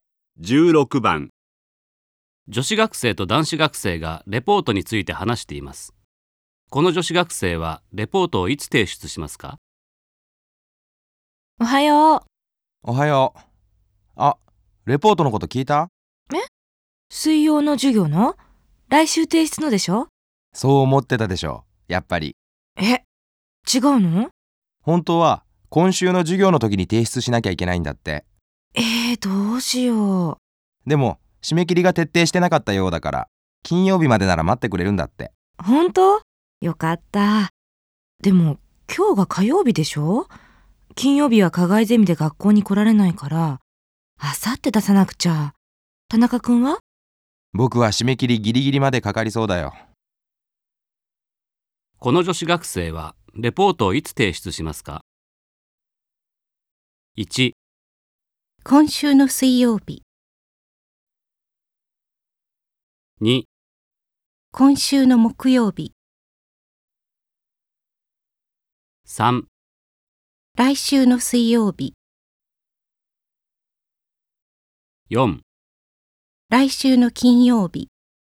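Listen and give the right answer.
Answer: 2: 今週の木曜日。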